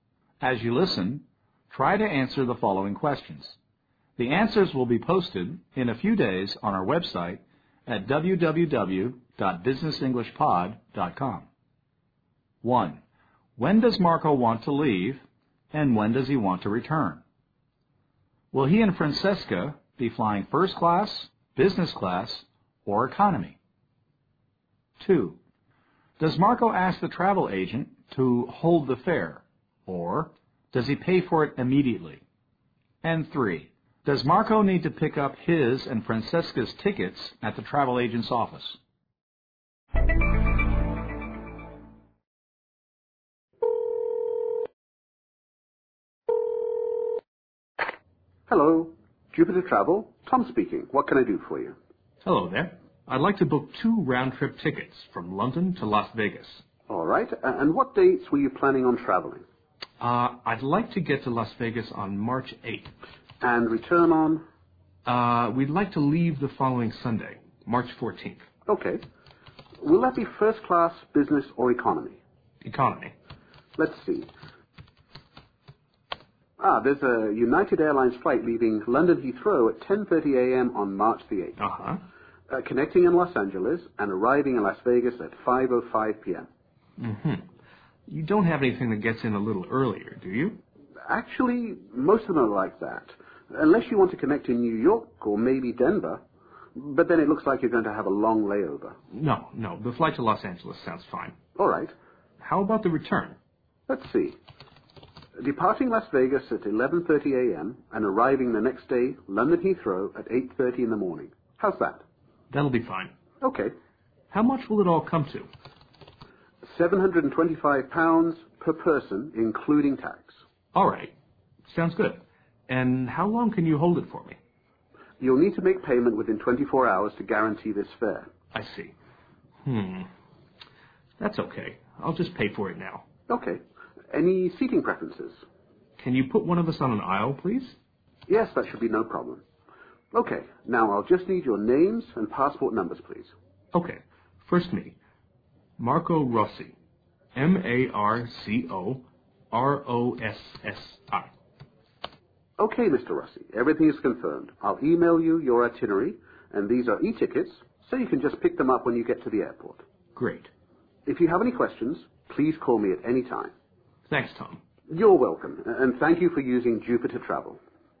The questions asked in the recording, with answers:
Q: When does Marco want to leave, and when does he want to return?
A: Marco says he'd like to get to, that is, arrive, in Las Vegas on March 8th and return on the following or next Sunday.

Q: Does Marco ask the travel agent to hold the fare, or does he pay for it immediately?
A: Marco decides to pay now.